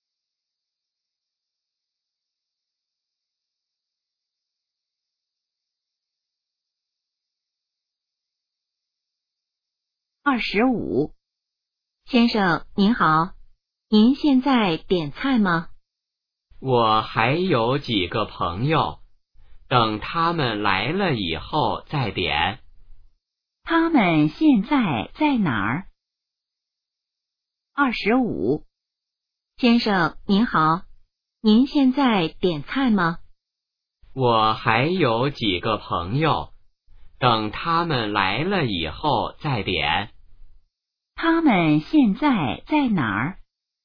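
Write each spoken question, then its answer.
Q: 他们现在在哪儿?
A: 饭馆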